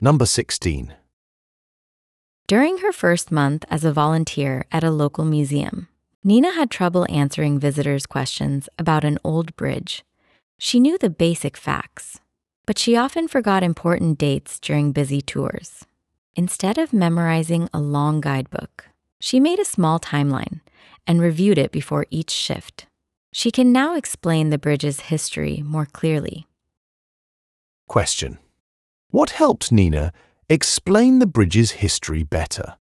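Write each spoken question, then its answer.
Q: What helped Nina explain the bridge's history better?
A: Reviewing a small timeline she made before each shift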